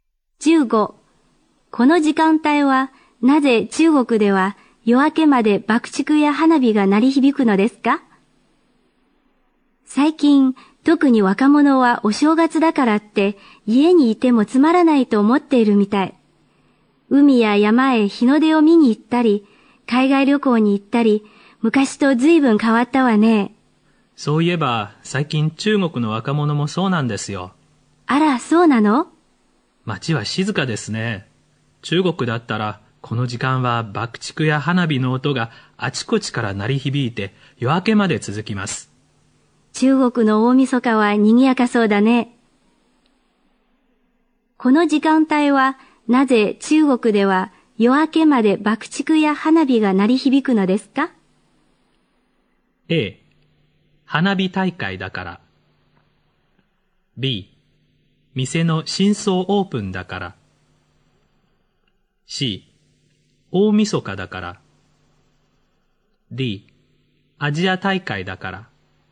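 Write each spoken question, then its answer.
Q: この時間帯は、なぜ中国では夜明けまで爆竹や花火が鳴り響くのですか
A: C: 大晦日だから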